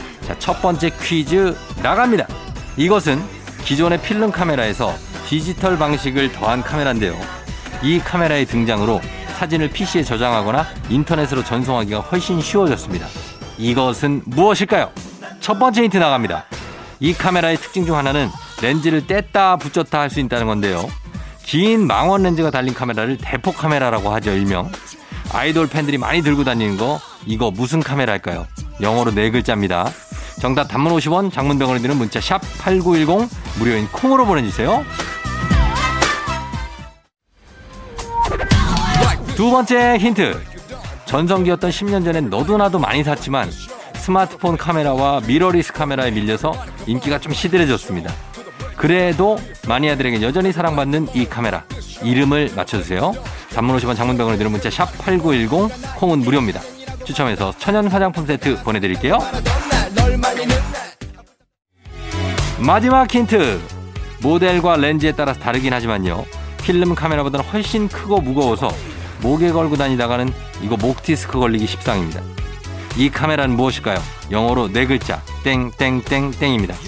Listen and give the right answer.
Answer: DSLR이죠.